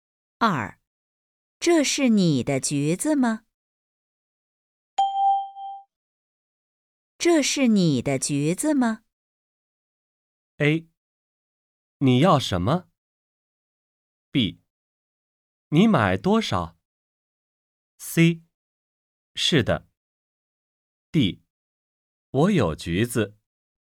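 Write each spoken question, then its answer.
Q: 这是你的橘子吗?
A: C: 是的。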